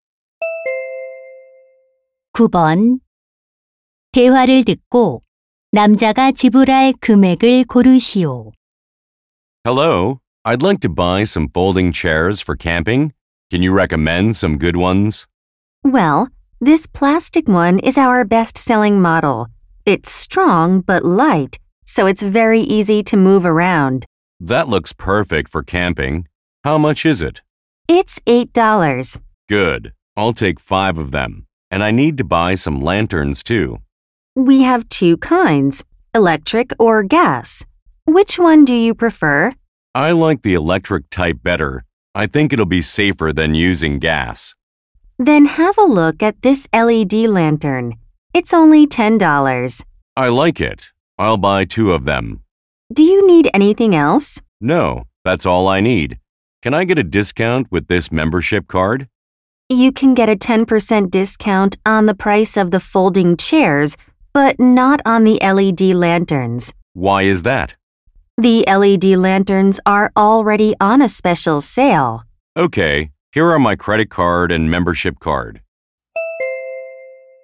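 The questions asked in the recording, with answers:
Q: 대화를 듣고 남자가 지불할 금액을 고르시오.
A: $56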